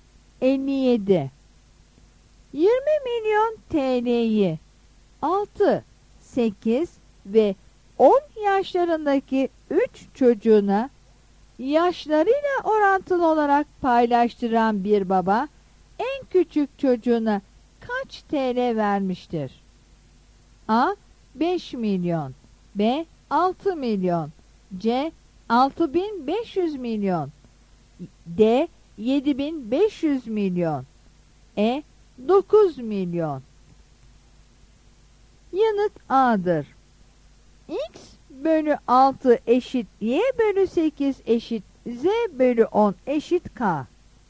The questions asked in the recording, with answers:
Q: 20 milyon TL'yi 6, 8 ve 10 yaşlarındaki 3 çocuğuna yaşlarıyla orantılı olarak paylaştıran bir baba en küçük çocuğuna kaç TL vermiştir?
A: Yanıt A'dır.